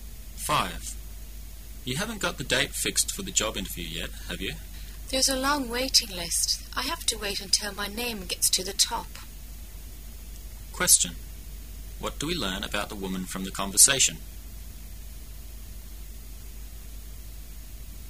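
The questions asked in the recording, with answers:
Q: What do we learn about the woman from the conversation?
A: She is waiting for her interview date because there is a long waiting list

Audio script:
[解析] M:You haven't got the date fixed for the job interview yet, have you? W:There is a long waiting list. I have to wait until my name gets to the top. Q: What do we learn about the woman from the conversation?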